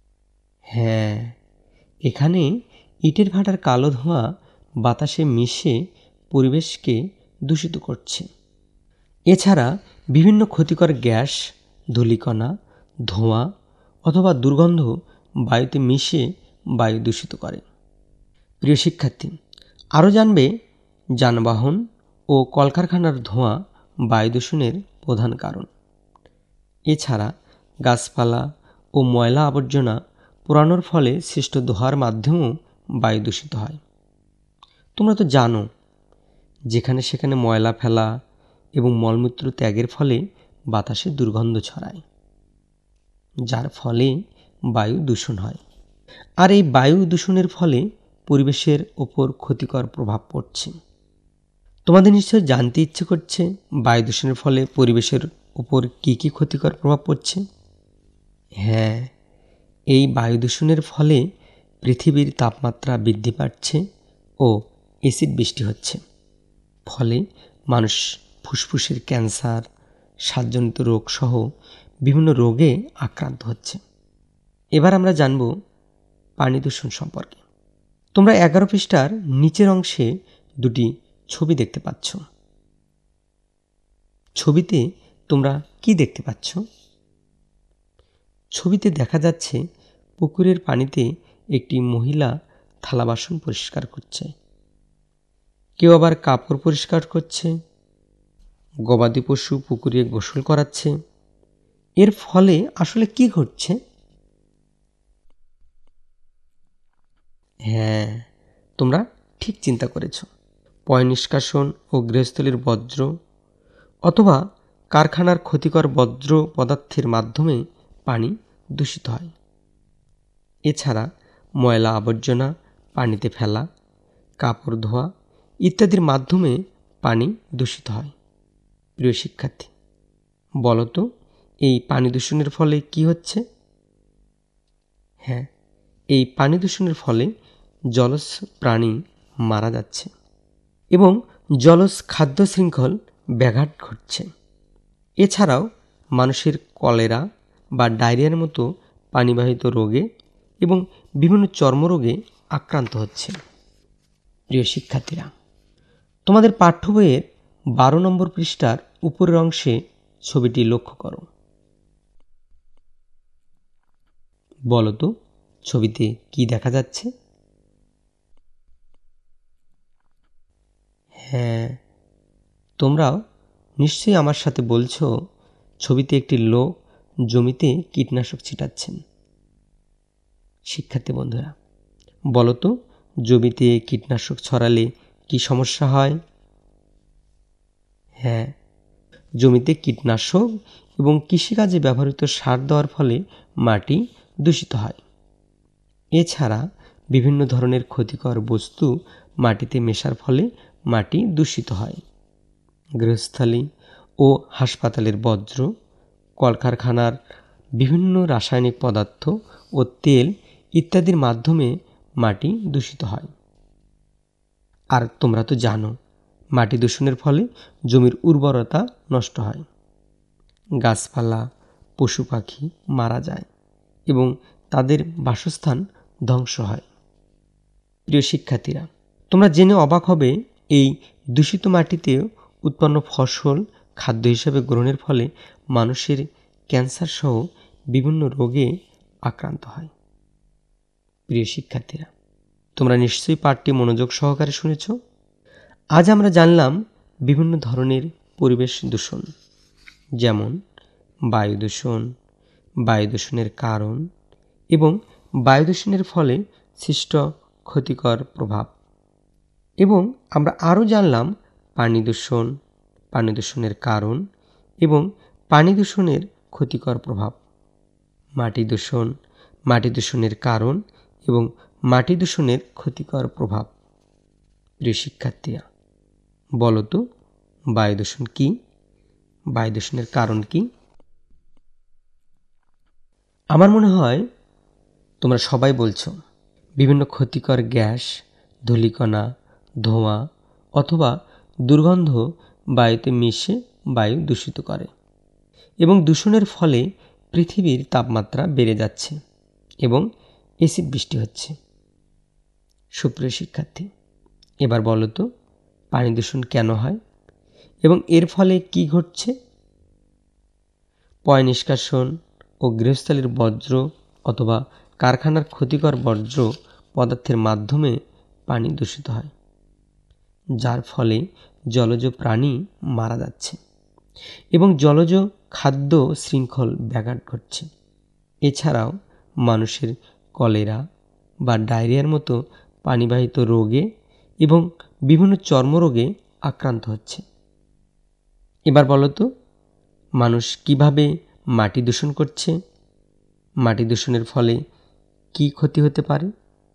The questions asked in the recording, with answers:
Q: প্রিয় শিক্ষার্থীরা, বলতো বায়ু দূষণ কী, বায়ু দূষণের কারণ কী?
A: বিভিন্ন ক্ষতিকর gas, ধূলিকণা, ধোঁয়া অথবা দুর্গন্ধ বায়ুতে মিশে বায়ু দূষিত করে

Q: সুপ্রিয় শিক্ষার্থী, এবার বলতো পানি দূষণ কেন হয় এবং এর ফলে কী ঘটছে?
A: পয় নিষ্কাশন ও গৃহস্থালির বর্জ্য অথবা কারখানার ক্ষতিকর বর্জ্য পদার্থের মাধ্যমে পানি দূষিত হয়, যার ফলে জলজ প্রাণী মারা যাচ্ছে এবং জলজ খাদ্য শৃঙ্খল ব্যাঘাত ঘটছে।

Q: এবার বলতো মানুষ কীভাবে মাটি দূষণ করছে, মাটি দূষণের ফলে কী ক্ষতি হতে পারে?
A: মানুষ জমিতে কীটনাশক, কৃষিকাজে ব্যবহৃত সার দেওয়ার ফলে মাটি দূষিত করছে।